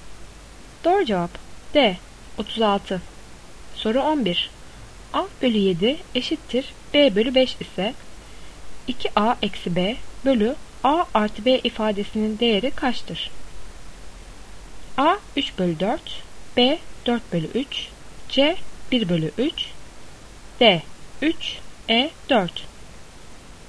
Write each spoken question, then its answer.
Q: A bölü 7 eşittir B bölü 5 ise 2A eksi B bölü A artı B ifadesinin değeri kaçtır?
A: Doğru cevap A 3 bölü 4.